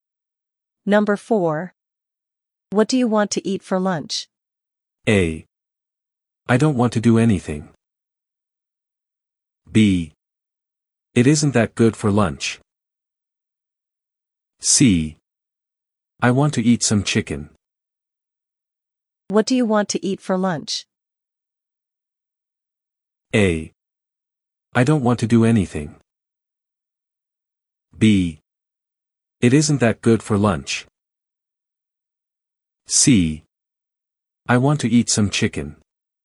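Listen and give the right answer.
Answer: C: I want to eat some chicken.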